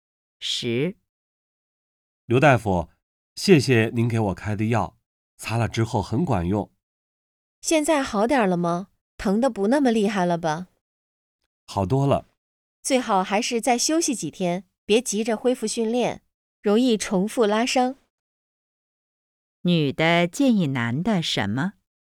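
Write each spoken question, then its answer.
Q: 女的建议男的什么?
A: 再休息几天,别急着恢复训练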